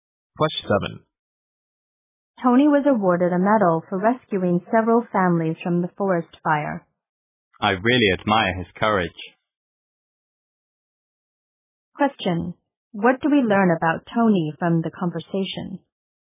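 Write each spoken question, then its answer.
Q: What do we learn about Tony from the conversation?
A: He was brave and rescued several families from a forest fire.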